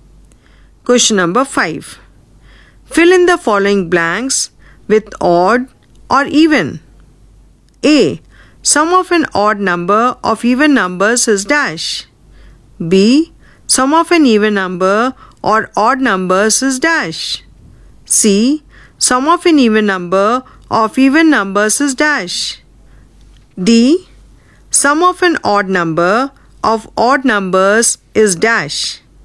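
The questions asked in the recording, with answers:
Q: Sum of an odd number of even numbers is dash.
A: even

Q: Sum of an even number or odd numbers is dash.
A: even

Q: Sum of an even number of even numbers is dash.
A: even

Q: Sum of an odd number of odd numbers is dash.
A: odd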